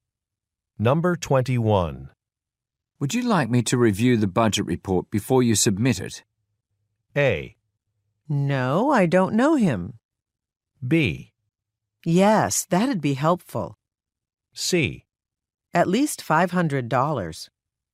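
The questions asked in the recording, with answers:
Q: Would you like me to review the budget report before you submit it?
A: B: Yes, that'd be helpful.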